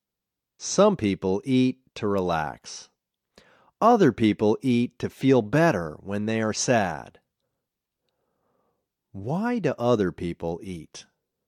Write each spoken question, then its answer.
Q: Why do other people eat?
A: Other people eat to feel better when they are sad.